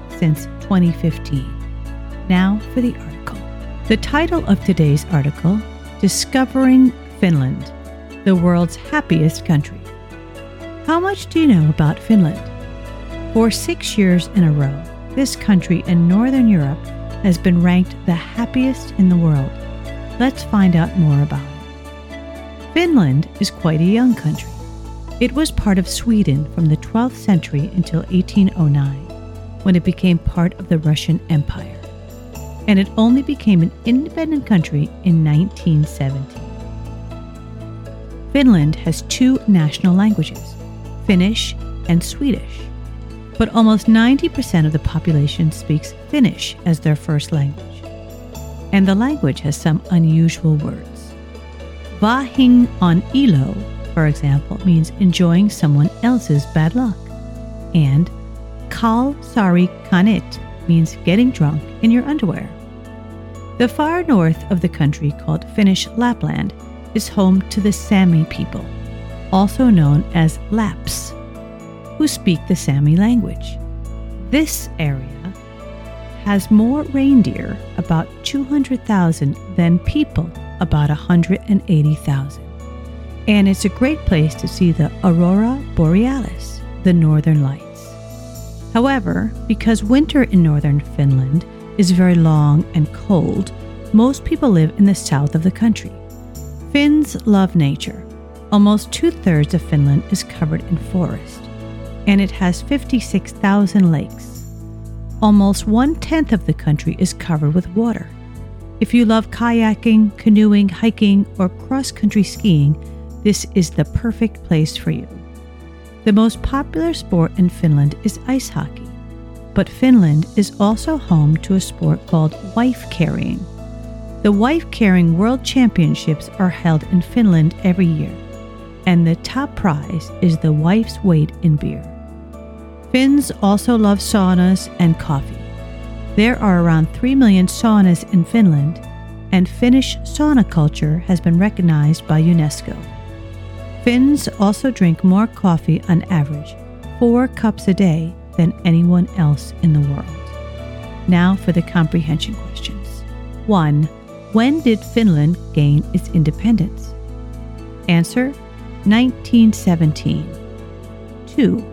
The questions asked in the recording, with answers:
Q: When did Finland gain its independence?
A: 1917.